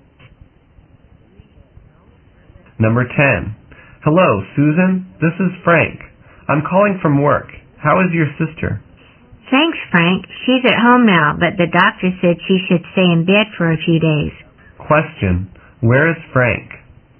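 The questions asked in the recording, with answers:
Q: Where is Frank?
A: At work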